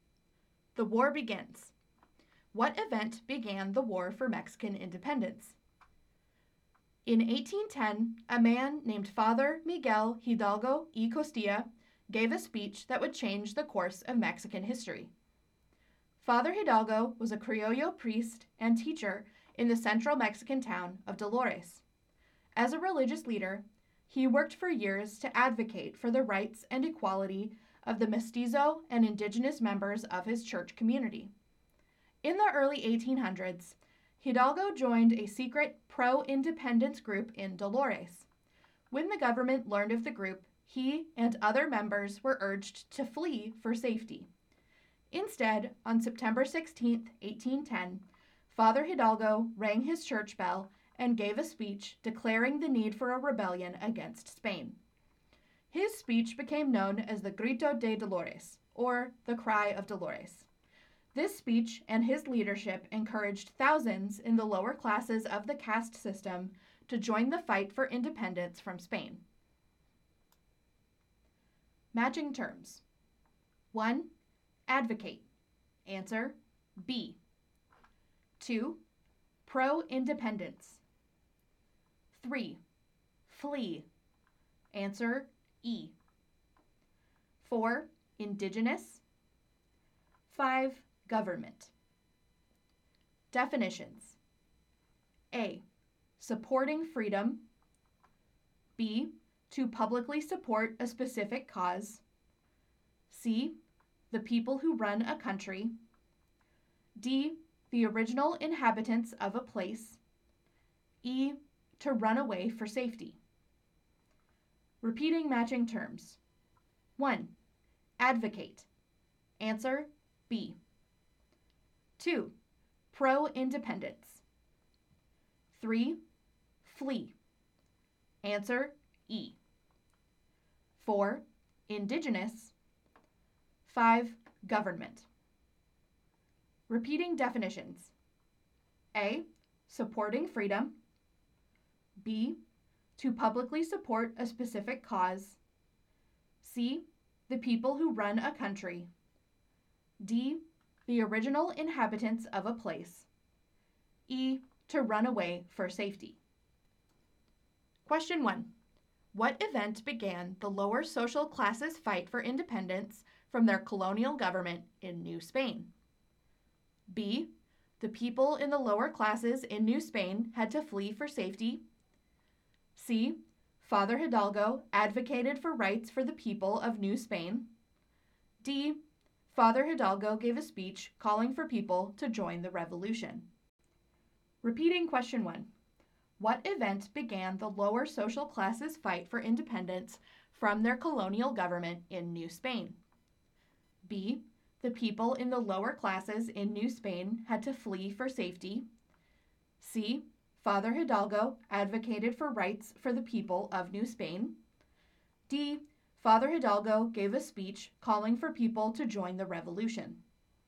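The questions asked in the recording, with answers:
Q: What event began the lower social classes' fight for independence from their colonial government in New Spain?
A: D: Father Hidalgo gave a speech calling for people to join the revolution.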